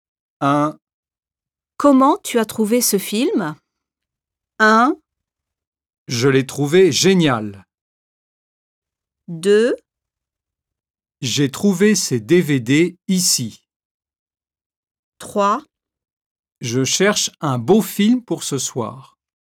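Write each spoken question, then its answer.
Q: Comment tu as trouvé ce film?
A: 1: Je l'ai trouvé génial.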